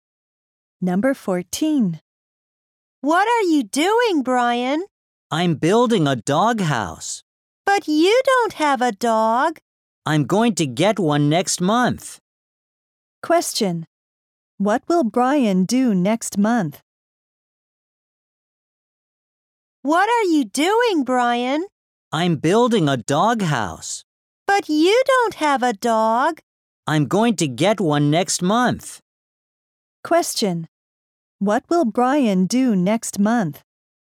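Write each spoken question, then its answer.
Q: What will Brian do next month?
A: Get a dog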